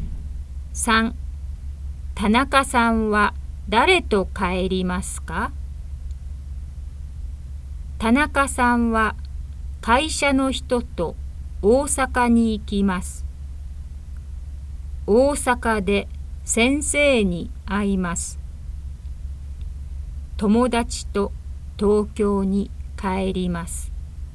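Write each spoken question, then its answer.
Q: 田中さんは誰と帰りますか?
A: 友達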